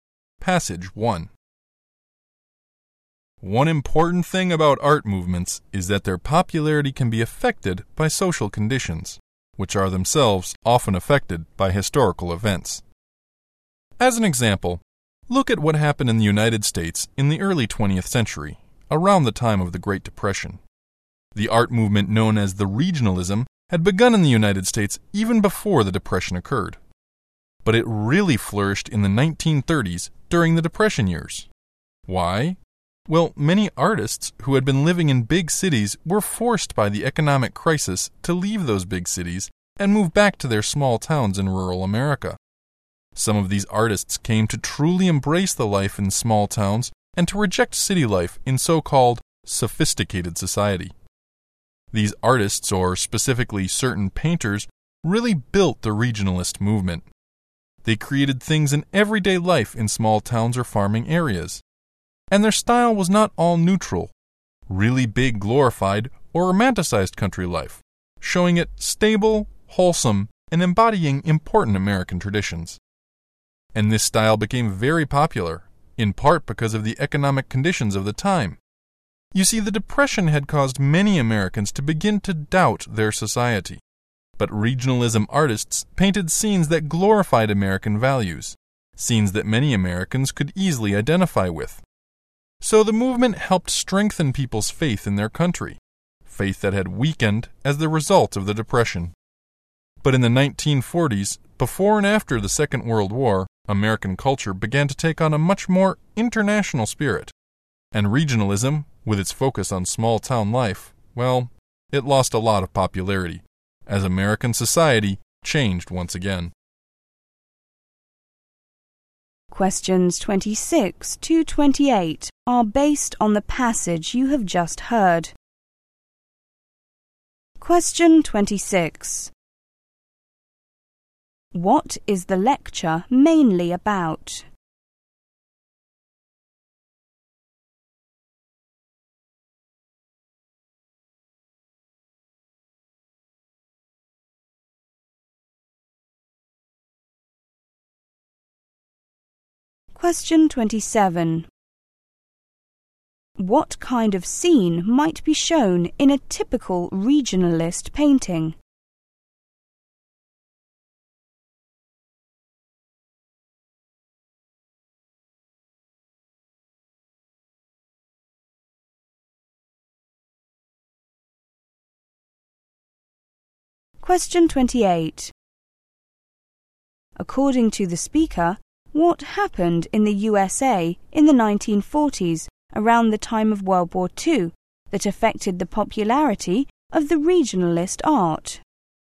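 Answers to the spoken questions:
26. How social conditions affected the popularity of regionalism, an American art movement
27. Everyday life in a small town or farming area
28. American culture became more international in spirit.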